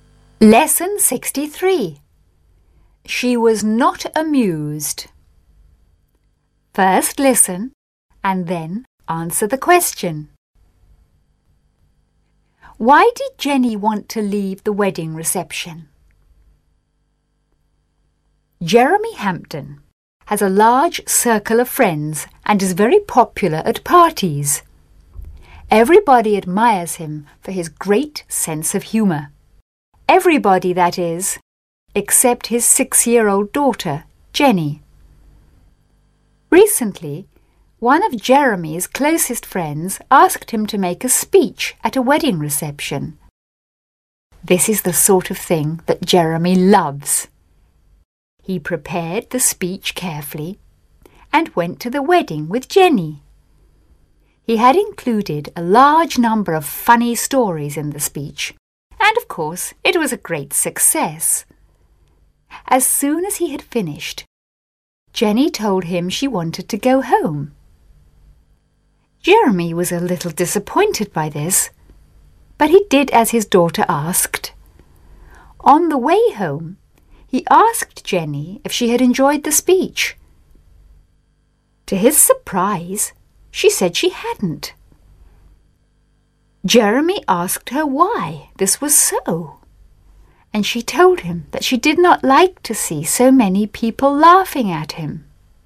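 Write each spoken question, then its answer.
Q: Why did Jenny want to leave the wedding reception?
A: She did not like to see so many people laughing at her father.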